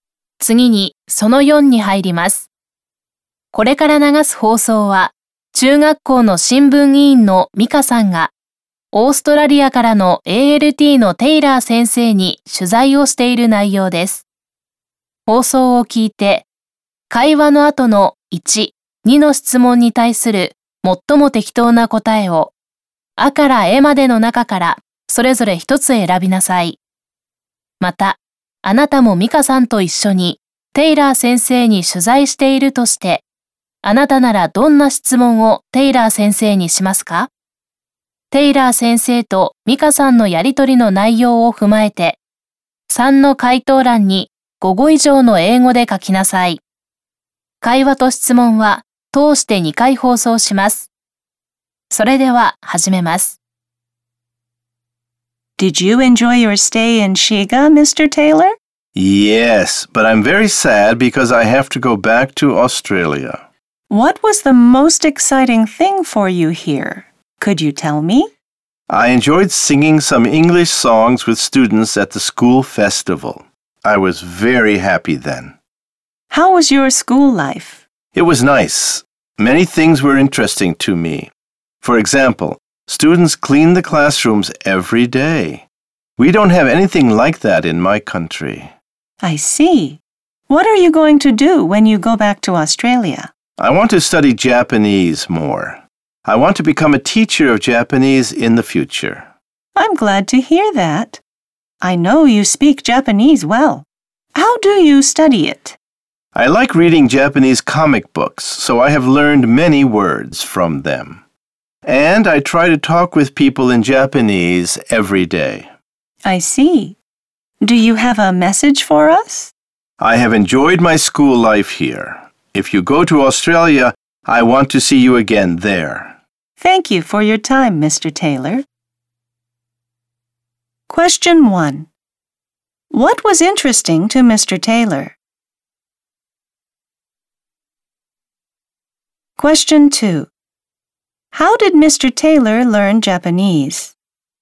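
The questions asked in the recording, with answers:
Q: What was interesting to Mr. Taylor?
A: Students clean the classrooms every day.

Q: How did Mr. Taylor learn Japanese?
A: By reading Japanese comic books and talking with people in Japanese every day.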